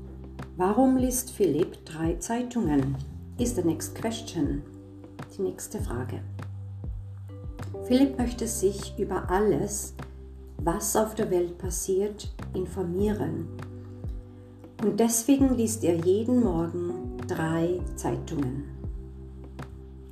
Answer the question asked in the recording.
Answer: Er möchte sich informieren.